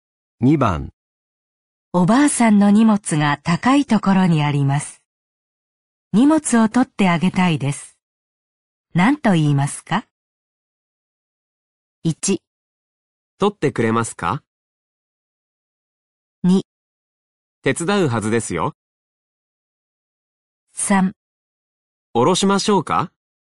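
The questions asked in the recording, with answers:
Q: 何と言いますか?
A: 3: 下ろしましょうか?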